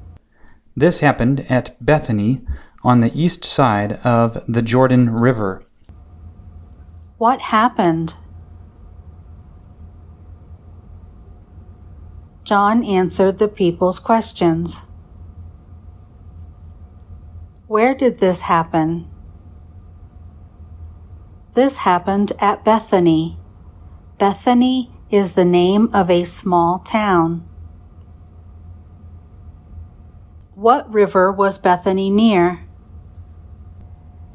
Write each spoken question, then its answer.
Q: What river was Bethany near?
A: Bethany was near the Jordan River.